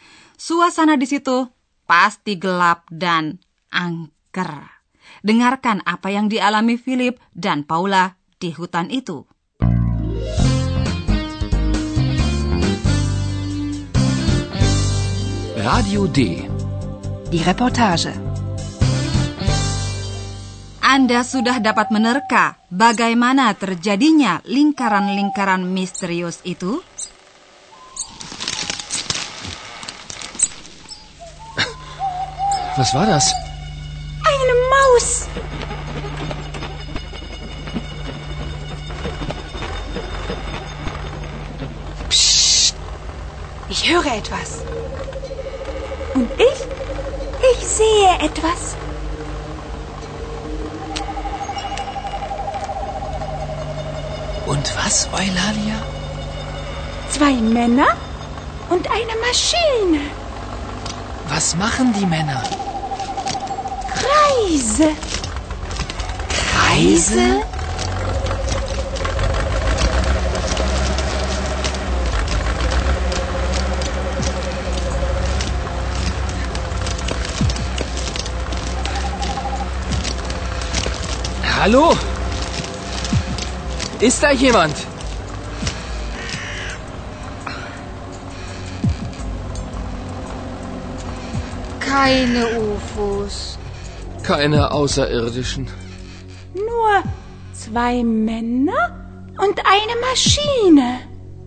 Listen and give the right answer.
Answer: Dua orang, menurut perkiraan kami petani dari desa itu, telah memotong lingkaran di ladang dengan memakai mesin.